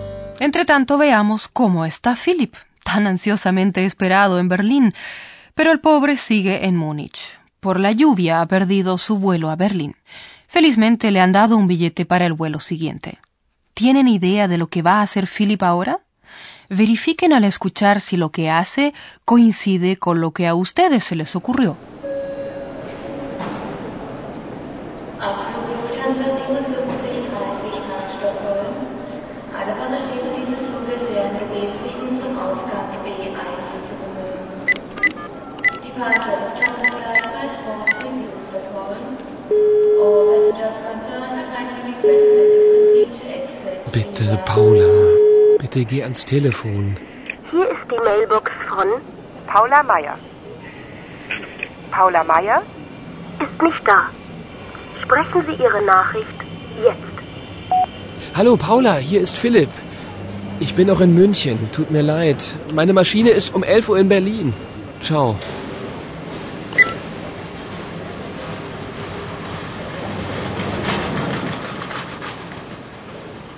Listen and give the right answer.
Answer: Philip intenta hablar por teléfono con Paula.